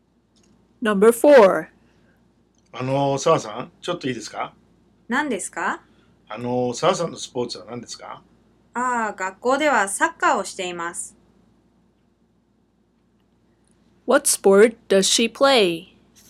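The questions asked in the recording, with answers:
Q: What sport does she play?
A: Soccer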